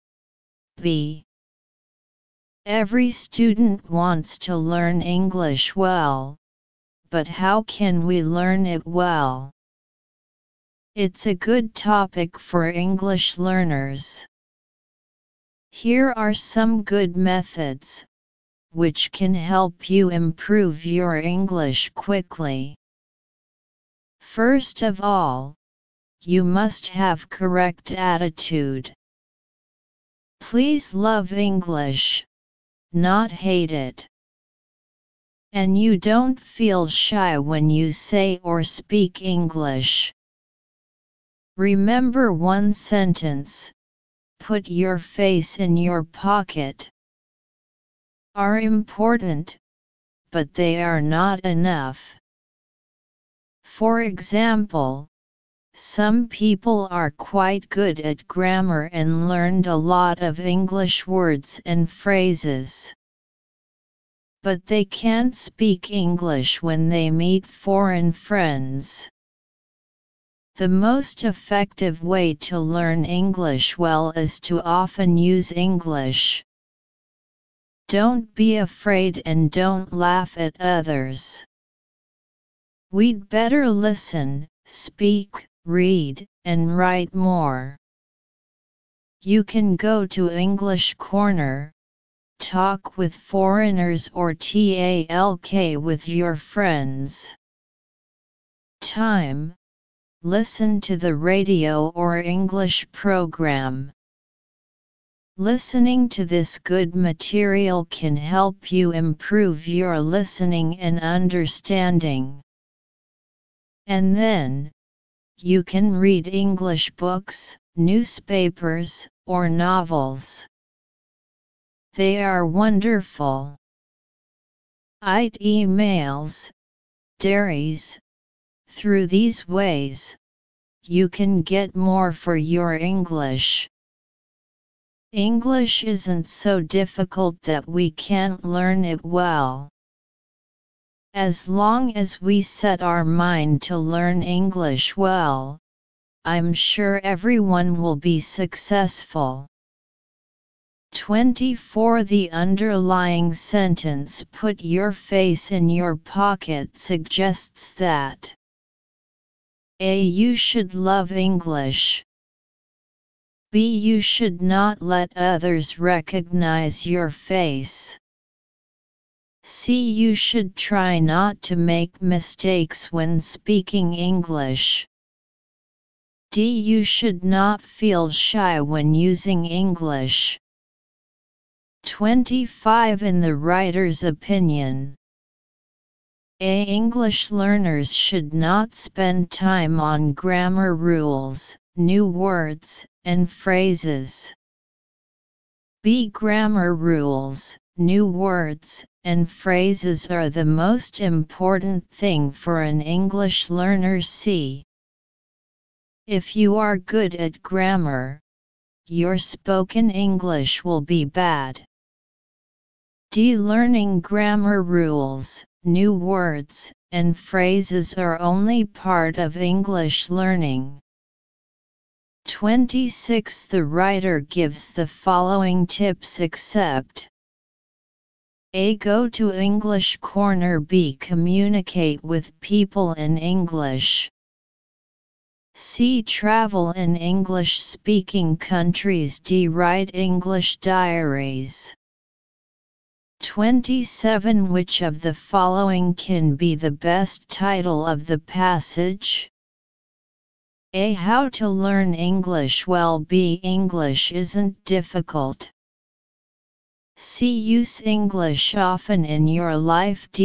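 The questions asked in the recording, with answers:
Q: The underlying sentence "put your face in your pocket" suggests that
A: D: You should not feel shy when using English.

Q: In the writer's opinion,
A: D: Learning grammar rules, new words, and phrases are only part of English learning.

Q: The writer gives the following tips except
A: C: Travel in English-speaking countries.

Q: Which of the following can be the best title of the passage?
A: A: How to learn English well.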